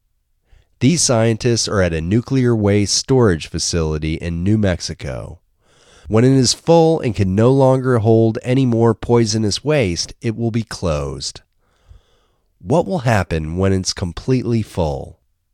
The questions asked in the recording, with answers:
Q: What will happen when it's completely full?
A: When it's completely full, it will be closed.